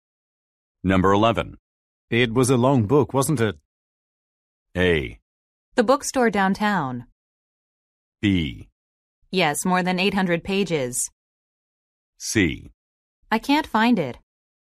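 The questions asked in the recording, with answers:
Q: It was a long book, wasn't it?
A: B: Yes, more than 800 pages.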